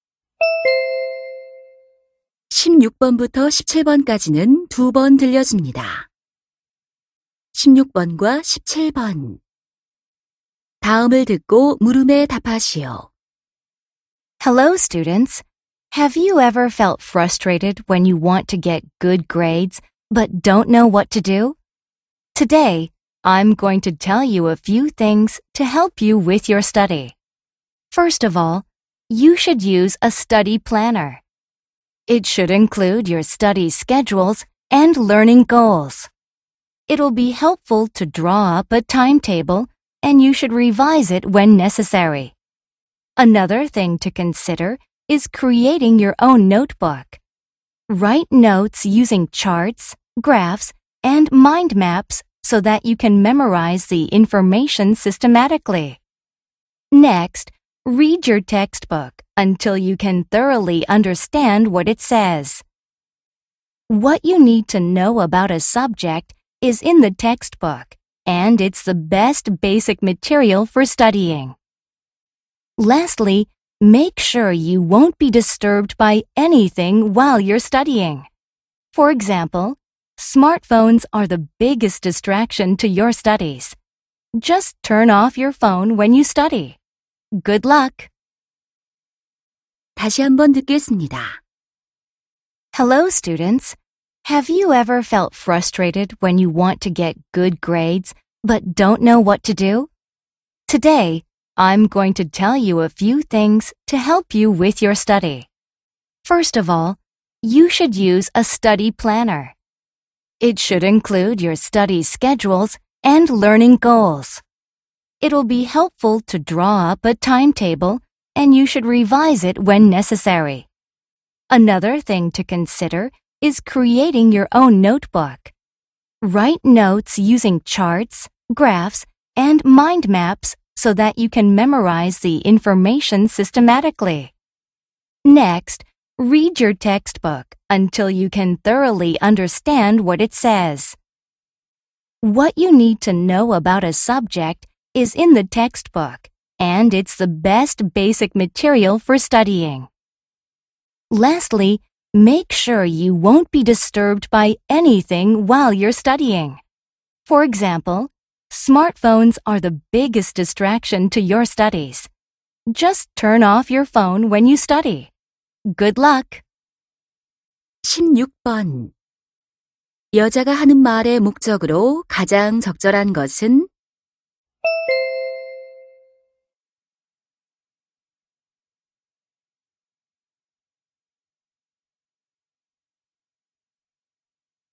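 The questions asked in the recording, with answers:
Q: 여자가 하는 말의 목적으로 가장 적절한 것은?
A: 성적을 올리는 공부 방법을 조언하려고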